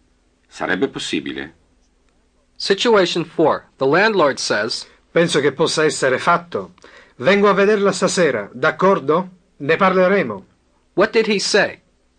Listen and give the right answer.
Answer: He said, I think that it can be done. I'll come to see you this evening, okay? We'll talk about it.